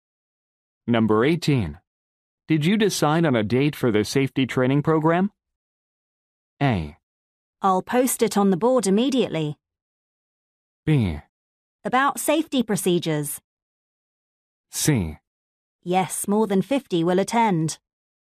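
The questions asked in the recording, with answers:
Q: Did you decide on a date for the safety training program?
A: A: I'll post it on the board immediately.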